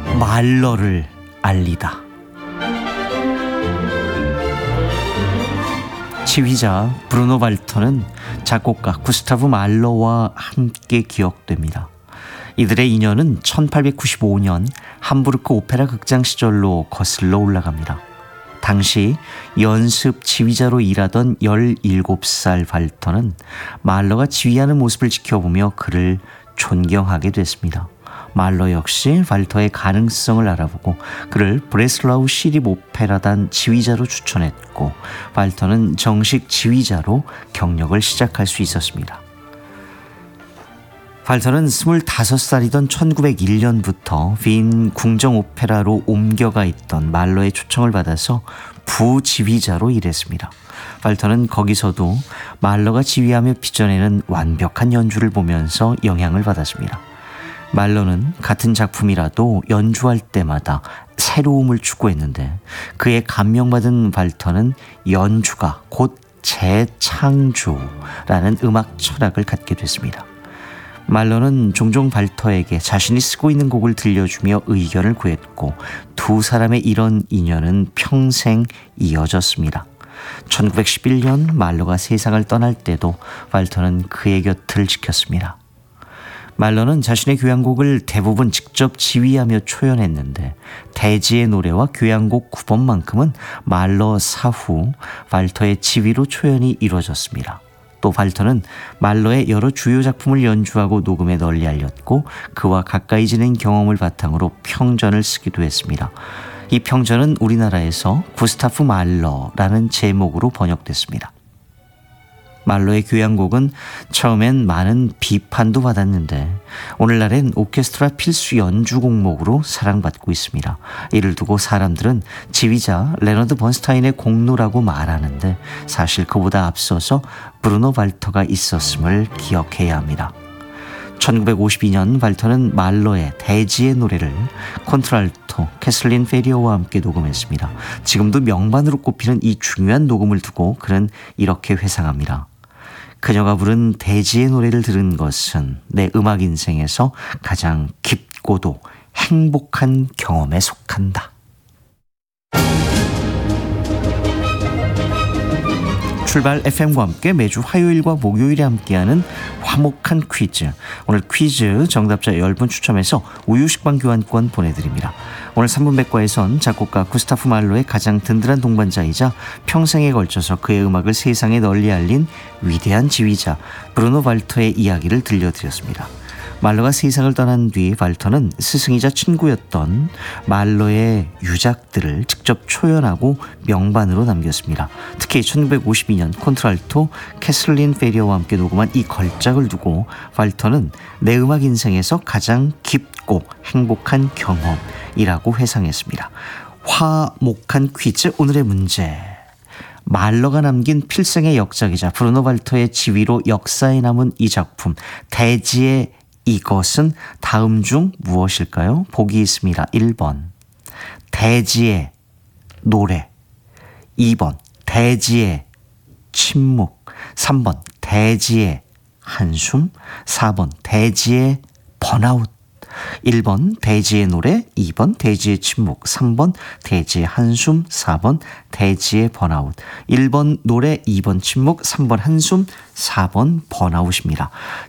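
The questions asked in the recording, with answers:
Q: 화목한 퀴즈 오늘의 문제. 말러가 남긴 필생의 역작이자 브루노 발터의 지휘로 역사에 남은 이 작품 대지의 이것은 다음 중 무엇일까요?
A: 1: 대지의 노래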